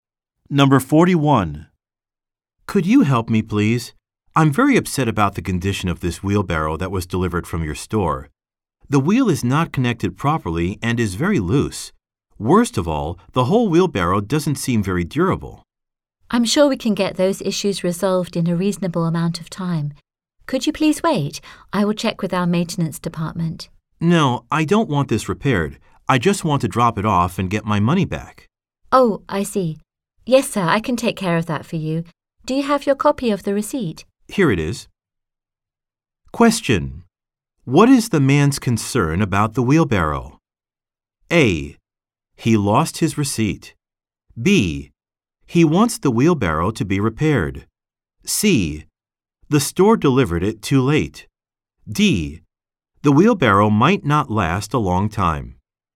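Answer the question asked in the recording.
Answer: D: The wheelbarrow might not last a long time.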